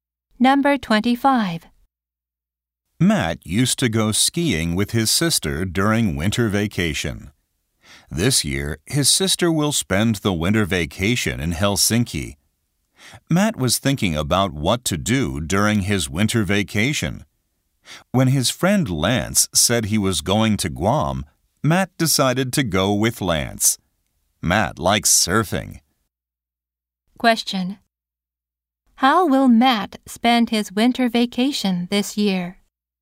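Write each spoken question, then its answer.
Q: How will Matt spend his winter vacation this year?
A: He will go to Guam with his friend Lance.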